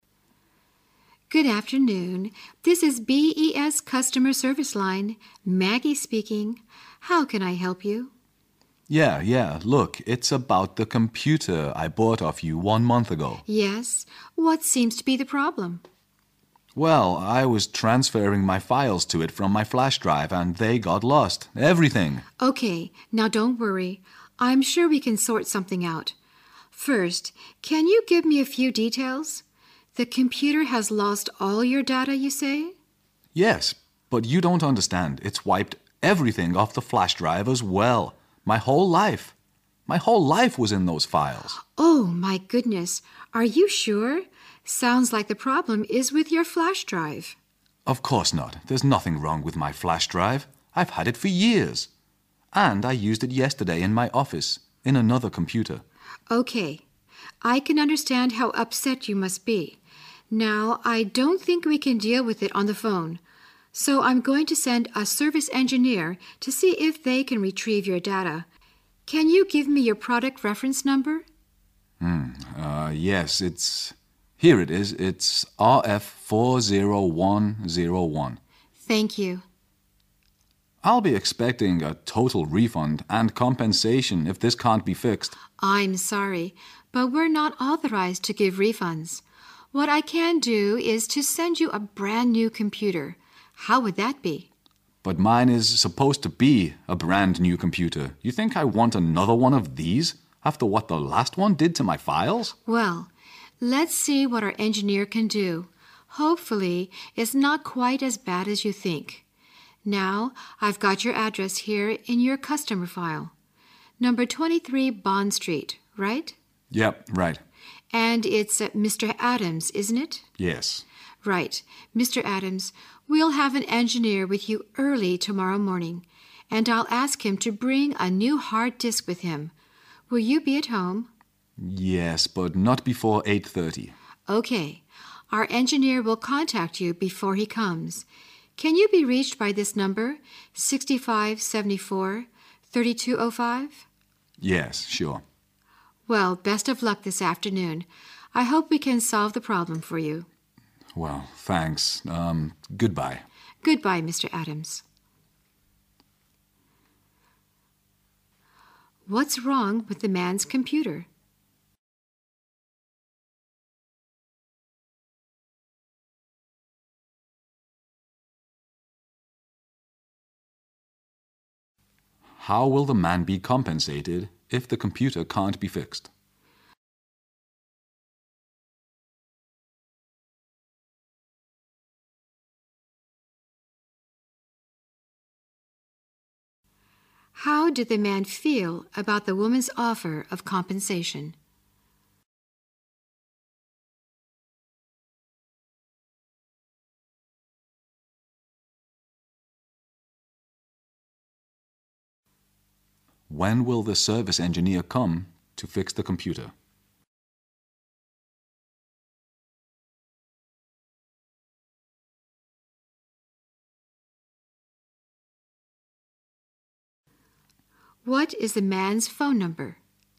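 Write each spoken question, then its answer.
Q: What's wrong with the man's computer?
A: It lost all his files, including those on his flash drive

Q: How will the man be compensated if the computer can't be fixed?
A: He will be given a brand new computer

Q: How did the man feel about the woman's offer of compensation?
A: He was unhappy and didn't want another one

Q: When will the service engineer come to fix the computer?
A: Early tomorrow morning, after 8:30

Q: What is the man's phone number?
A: 6574-3205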